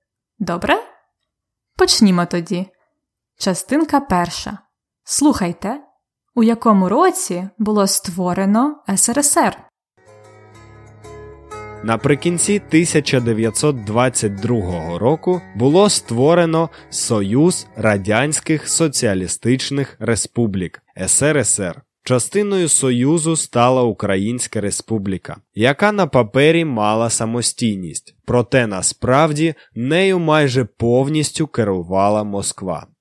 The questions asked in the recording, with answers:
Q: Слухайте, у якому році було створено СРСР.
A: СРСР було створено в 1922 році.